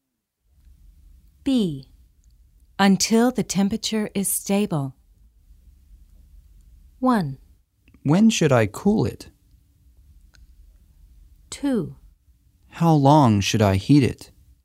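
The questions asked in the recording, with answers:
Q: Until the temperature is stable.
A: 2: How long should I heat it?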